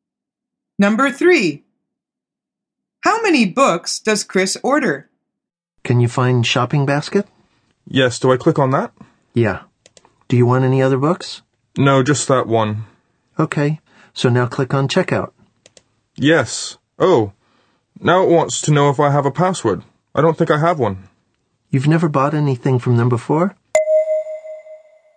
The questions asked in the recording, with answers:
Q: How many books does Chris order?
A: The answer is 1.